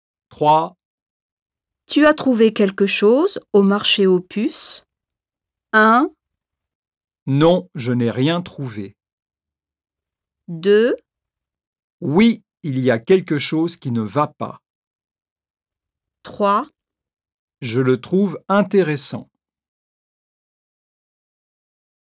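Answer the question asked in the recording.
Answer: 1: Non, je n'ai rien trouvé.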